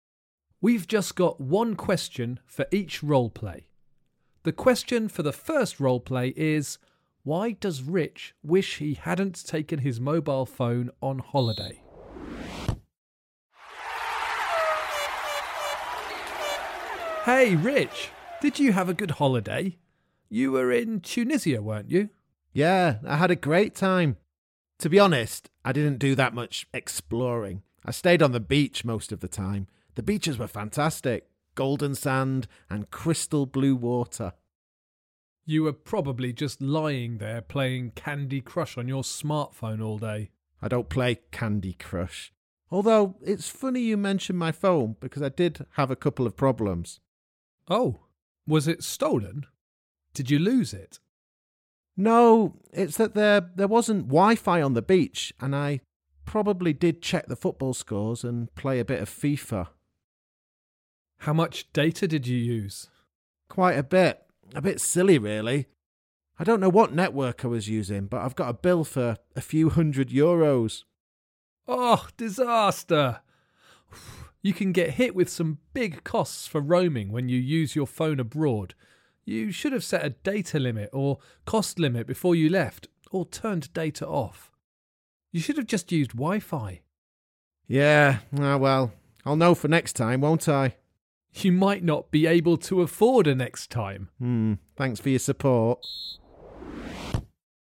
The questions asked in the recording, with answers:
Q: why does Rich wish he hadn't taken his mobile phone on holiday?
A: It was because I used a bit too much data on my phone and ended up with a huge bill to pay.